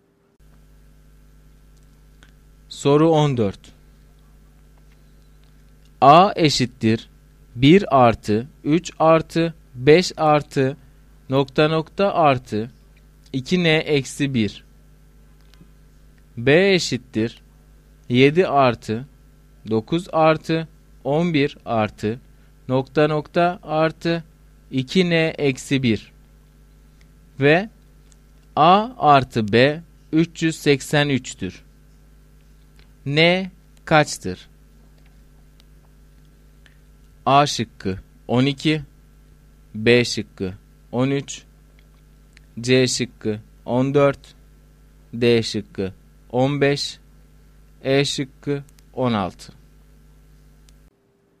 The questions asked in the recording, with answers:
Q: N kaçtır?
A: Doğru cevap C şıkkı.